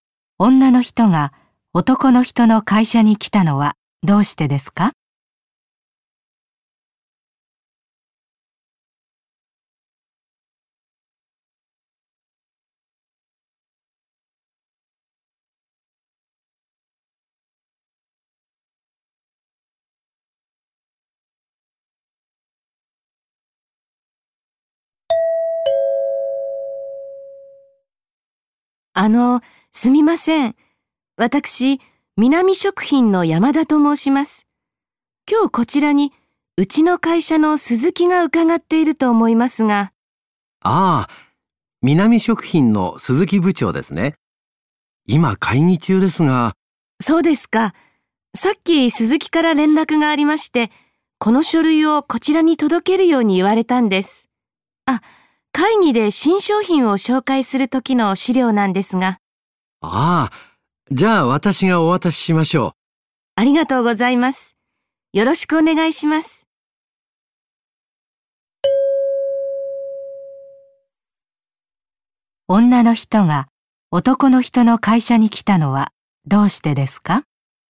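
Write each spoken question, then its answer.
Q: 女の人が男の人の会社に来たのはどうしてですか?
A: 鈴木部長に会議の資料(書類)を届けるため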